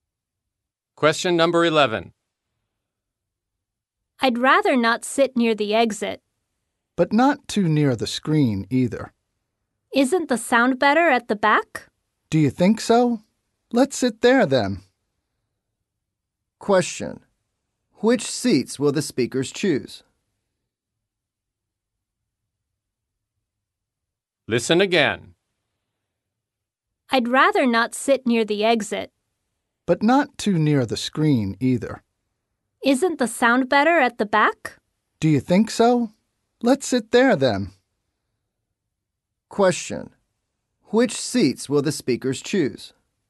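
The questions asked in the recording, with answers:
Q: Which seats will the speakers choose?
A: Seats at the back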